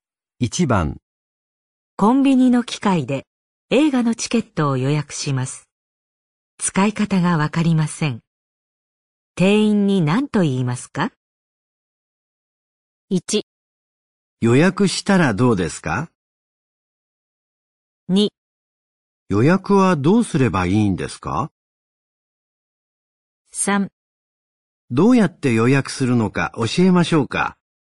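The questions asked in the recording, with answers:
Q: 店員に何と言いますか?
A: 2: 予約はどうすればいいんですか?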